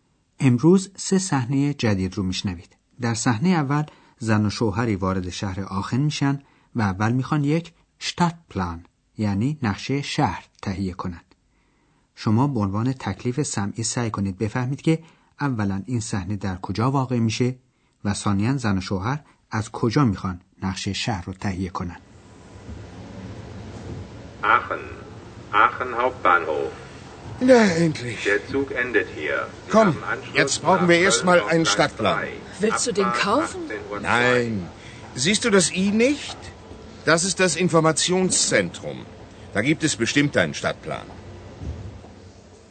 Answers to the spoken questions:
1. محل این صحنه ایستگاه راه آهن آخنه
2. در این ایستگاه هم مثل اغلب شهرهای بزرگ یک قسمت اطلاعات وجود داره که در اونجا نقشه کوچک شهر رو هم به علاقمندان میدن